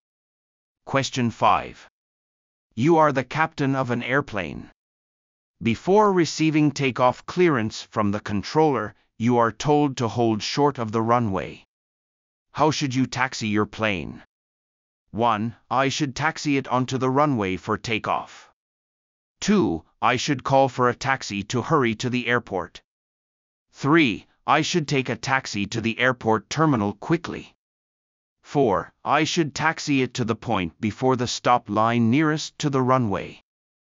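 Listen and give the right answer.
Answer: 4: I should taxi it to the point before the stop line nearest to the runway.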